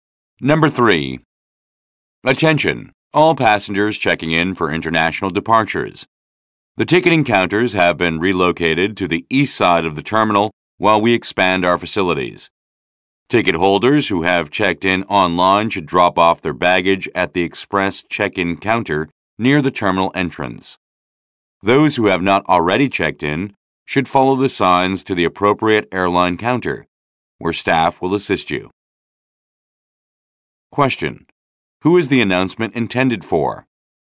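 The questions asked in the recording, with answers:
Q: Who is the announcement intended for?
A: Passengers checking in for international departures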